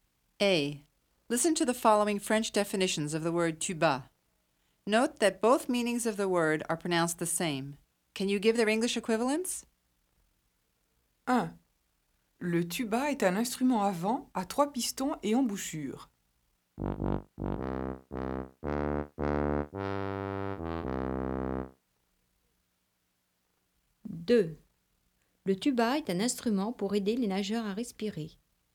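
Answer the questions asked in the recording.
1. tuba
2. snorkel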